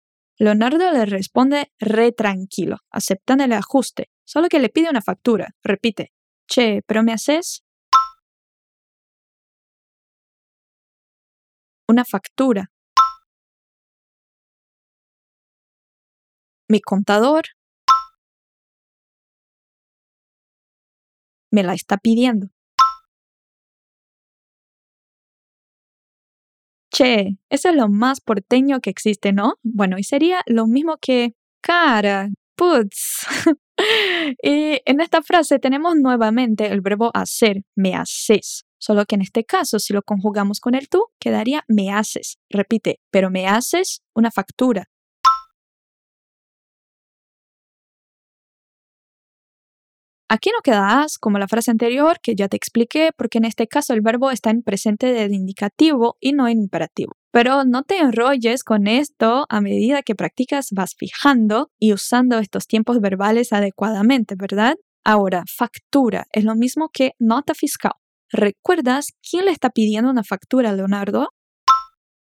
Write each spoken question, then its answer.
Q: ¿Recuerdas quién le está pidiendo una factura a Leonardo?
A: El contador.